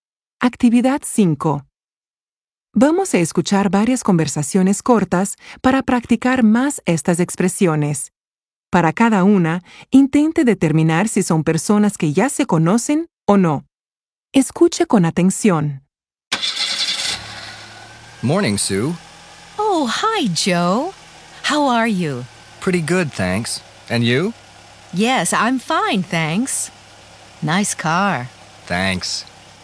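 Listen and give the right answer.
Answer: Sí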